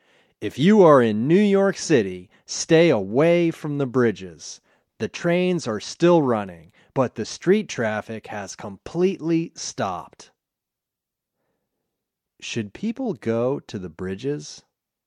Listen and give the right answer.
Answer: No, people shouldn't go to the bridges.